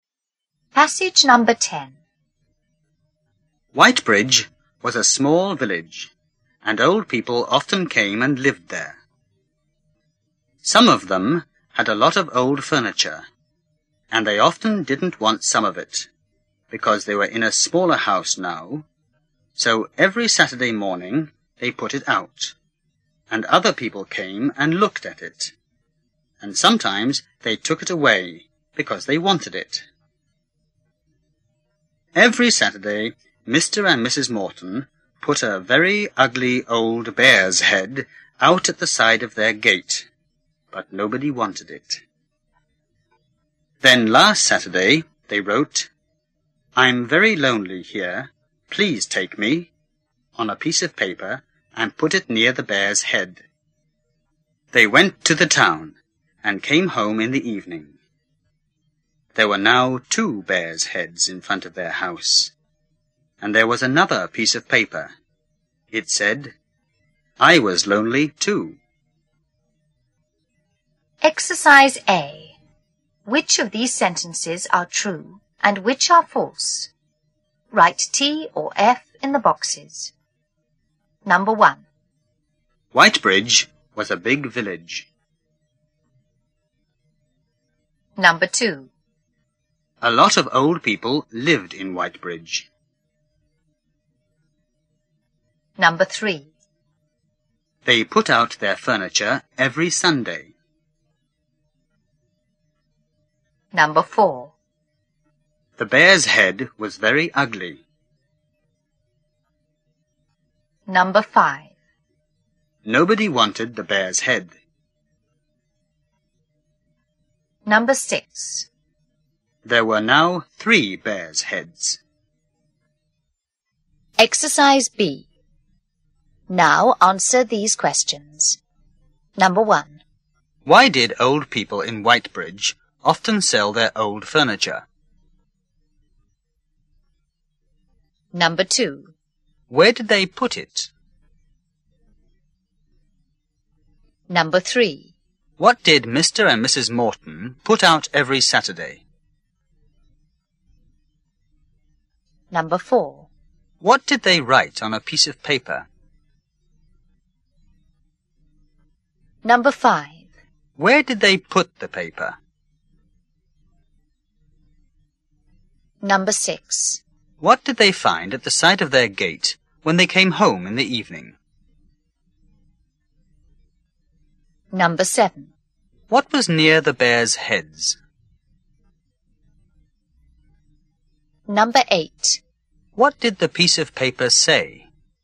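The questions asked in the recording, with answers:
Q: Whitebridge was a big village.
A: False

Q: A lot of old people lived in Whitebridge.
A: True

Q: They put out their furniture every Sunday.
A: False

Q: The bear's head was very ugly.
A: True

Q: Nobody wanted the bear's head.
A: True

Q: There were now three bear's heads.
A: False

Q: Why did old people in Whitebridge often sell their old furniture?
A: Because they were in a smaller house now

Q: What did Mr. and Mrs. Morton put out every Saturday?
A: A very ugly old bear's head

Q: What did they write on a piece of paper?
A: "I'm very lonely here. Please take me."

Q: Where did they put the paper?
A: Near the bear's head

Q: What did they find at the side of their gate when they came home in the evening?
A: Two bears' heads

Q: What was near the bear's heads?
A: Another piece of paper

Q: What did the piece of paper say?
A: "I was lonely too."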